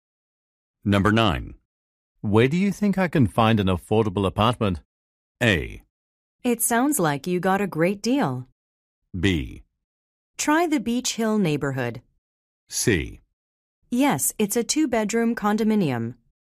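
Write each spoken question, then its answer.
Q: Where do you think I can find an affordable apartment?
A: B: Try the Beach Hill neighborhood.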